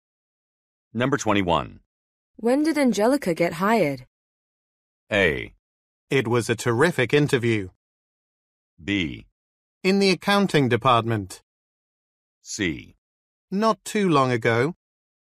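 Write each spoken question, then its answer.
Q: When did Angelica get hired?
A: C: Not too long ago.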